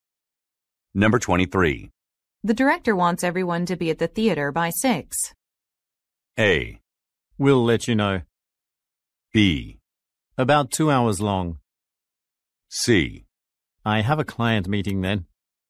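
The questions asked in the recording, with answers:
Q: The director wants everyone to be at the theater by 6.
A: C: I have a client meeting then.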